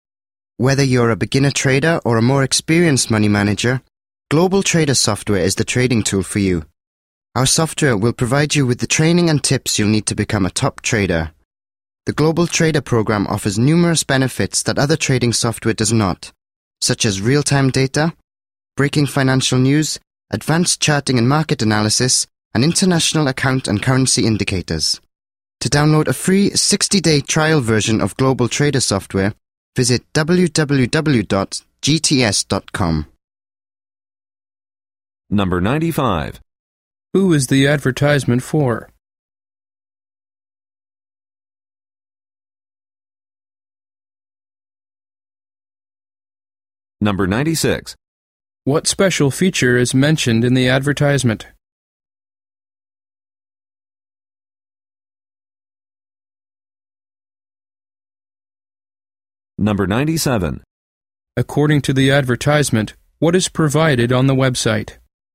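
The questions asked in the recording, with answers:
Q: Who is the advertisement for?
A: Traders, from beginners to experienced money managers

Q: According to the advertisement, what is provided on the website?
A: A free 60-day trial version of the software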